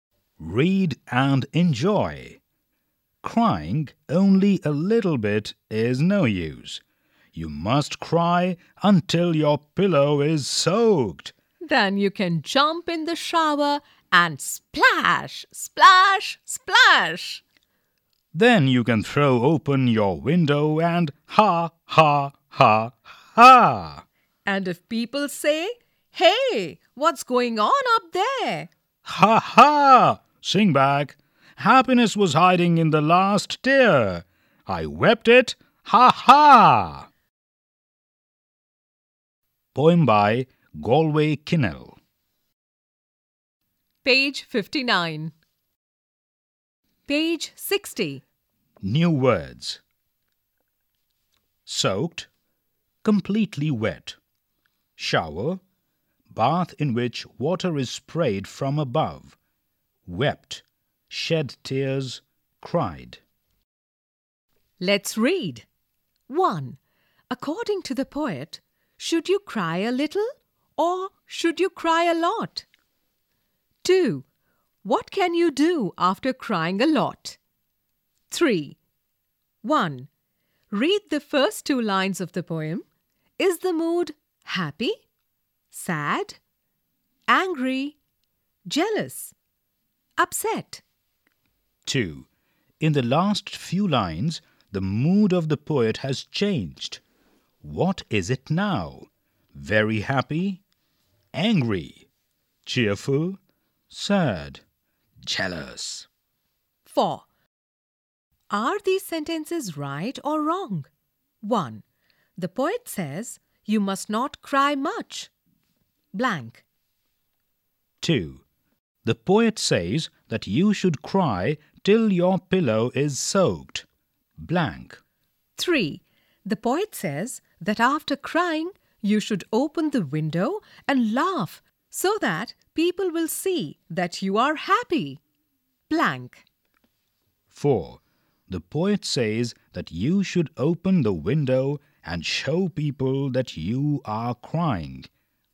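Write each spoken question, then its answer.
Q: According to the poet, should you cry a little or should you cry a lot?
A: A lot, until your pillow is soaked

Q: What can you do after crying a lot?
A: Jump in the shower and splash, then throw open the window and laugh

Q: The poet says you must not cry much.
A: Wrong

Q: The poet says that you should cry till your pillow is soaked.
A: Right

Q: The poet says that after crying, you should open the window and laugh so that people will see that you are happy.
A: Right

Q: The poet says that you should open the window and show people that you are crying.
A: Wrong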